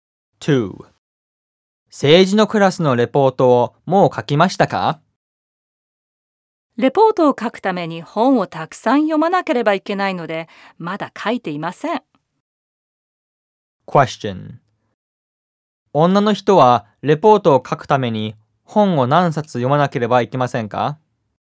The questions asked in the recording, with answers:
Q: 女の人はレポートを書くために本を何冊読まなければいけませんか?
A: レポートを書くために本を何冊も読まなければいけません。